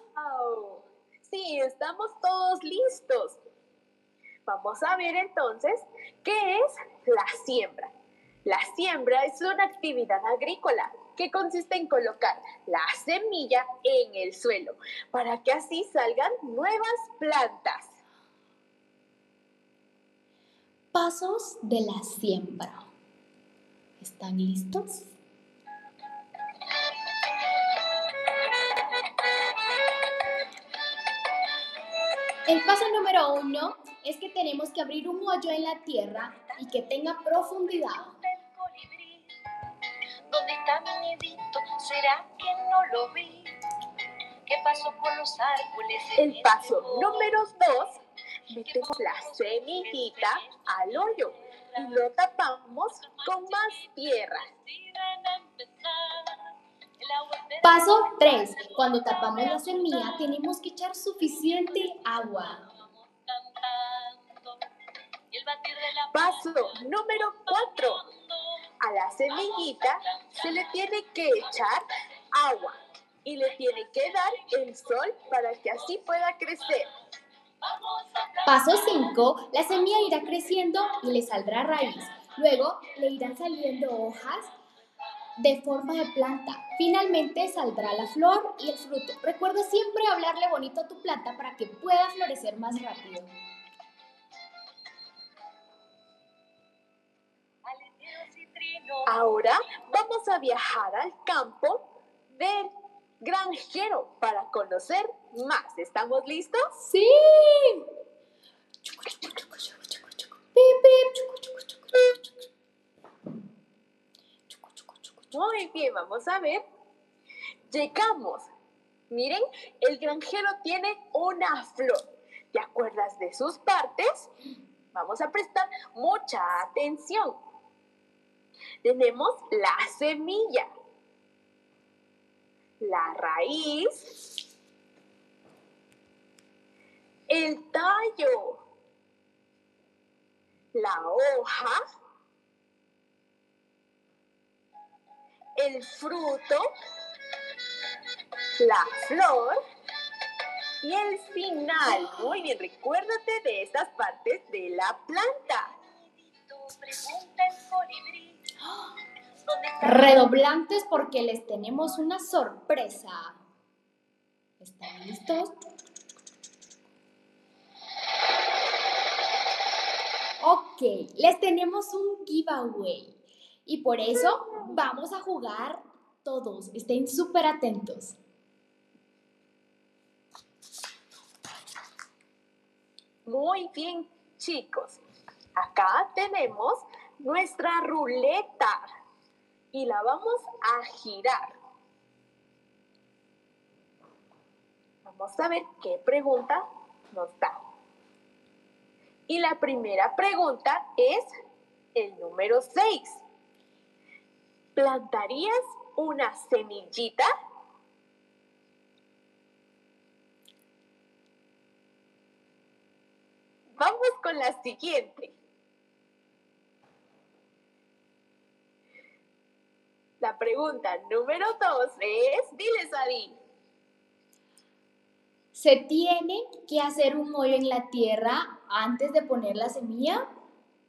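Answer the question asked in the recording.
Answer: Sí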